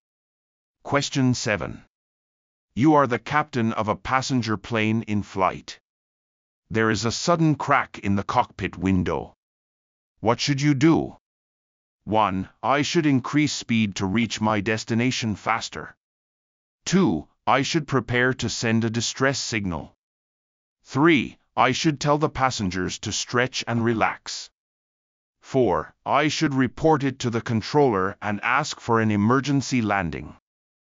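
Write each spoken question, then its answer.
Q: What should you do?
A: 4: I should report it to the controller and ask for an emergency landing.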